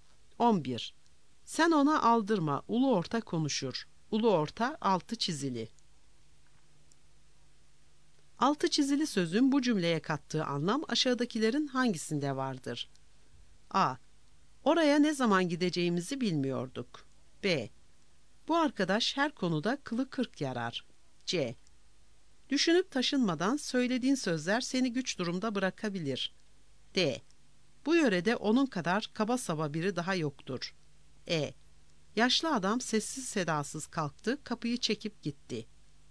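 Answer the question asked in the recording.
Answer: C: Düşünüp taşınmadan söylediğin sözler seni güç durumda bırakabilir.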